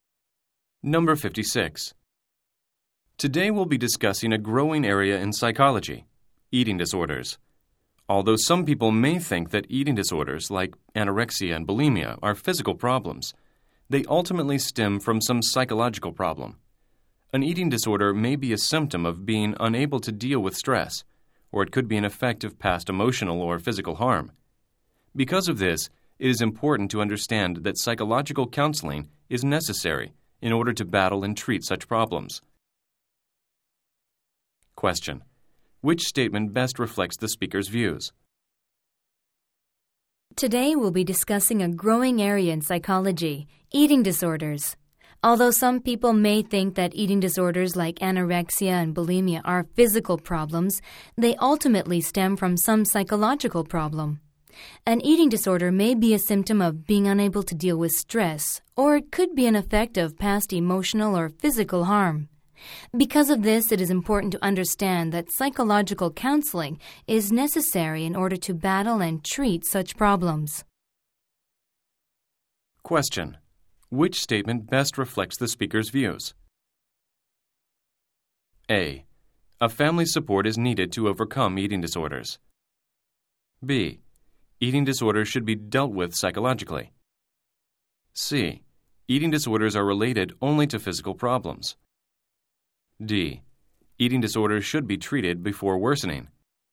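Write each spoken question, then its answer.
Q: Which statement best reflects the speaker's views?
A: B: Eating disorders should be dealt with psychologically.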